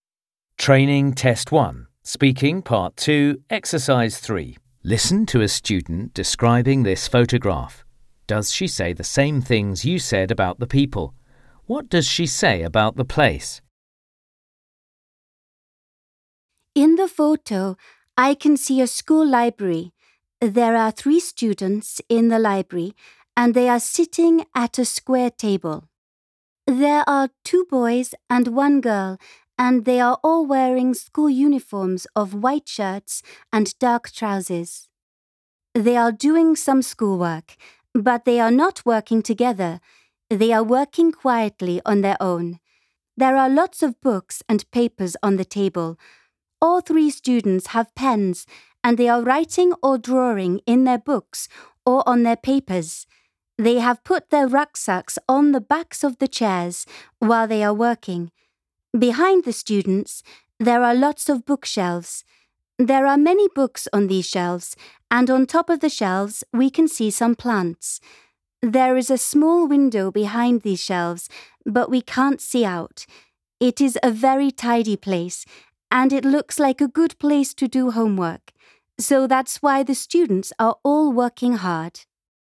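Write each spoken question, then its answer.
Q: What does she say about the place?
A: It is a school library; it is very tidy and looks like a good place to do homework.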